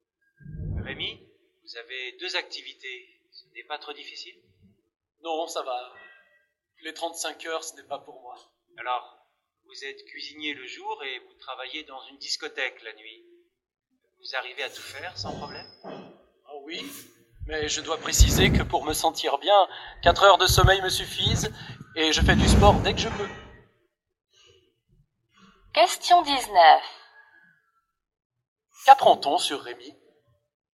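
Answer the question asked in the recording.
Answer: Il a besoin de peu de sommeil (4 heures lui suffisent)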